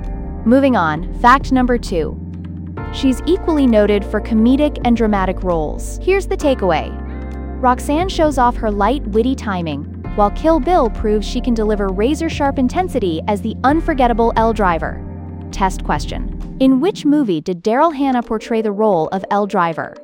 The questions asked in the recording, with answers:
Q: In which movie did Daryl Hannah portray the role of L Driver?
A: Kill Bill.